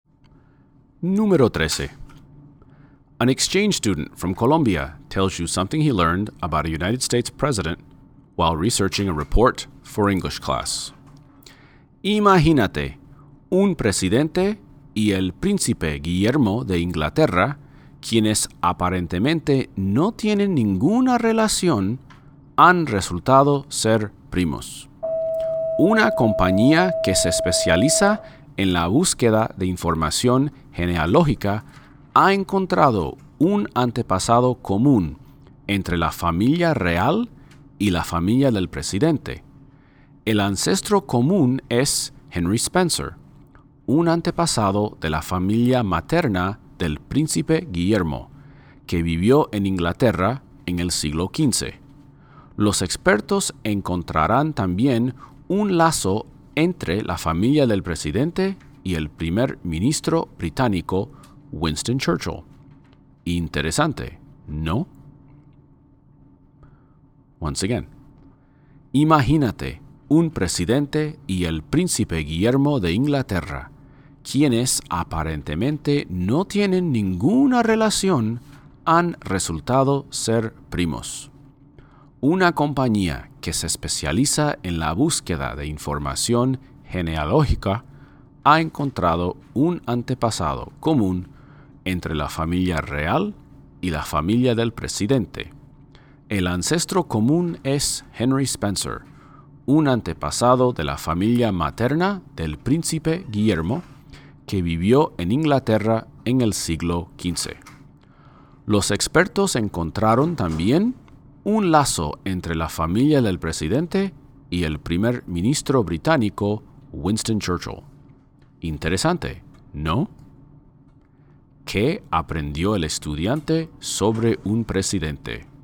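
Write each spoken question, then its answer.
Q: ¿Qué aprendió el estudiante sobre un presidente?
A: Que es primo del príncipe Guillermo de Inglaterra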